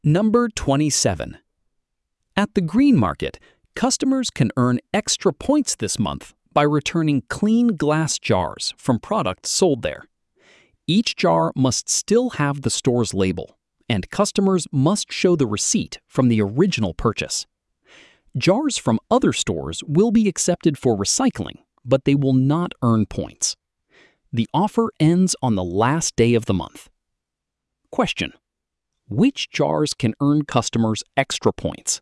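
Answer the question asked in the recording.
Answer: Clean glass jars from products sold at the Green Market, still labeled, with the original receipt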